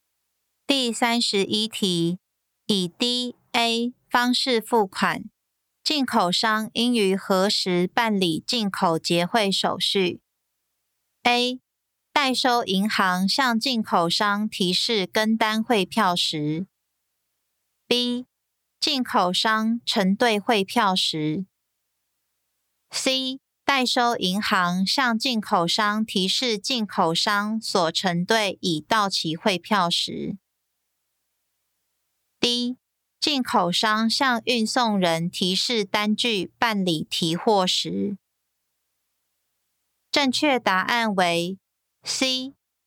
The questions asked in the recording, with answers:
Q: 以 DA 方式付款,进口商应于何时办理进口结汇手续?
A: 正确答案为 C.